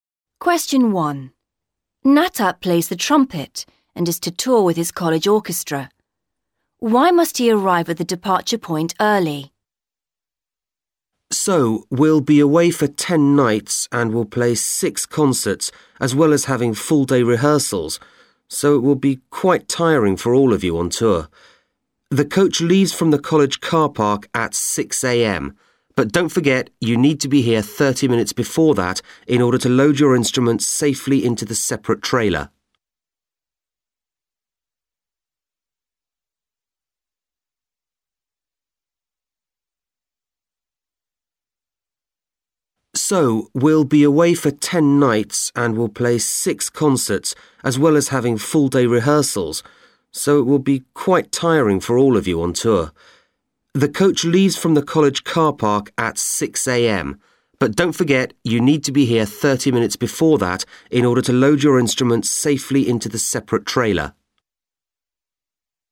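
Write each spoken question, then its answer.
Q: Why must he arrive at the departure point early?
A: To load the instruments safely into the separate trailer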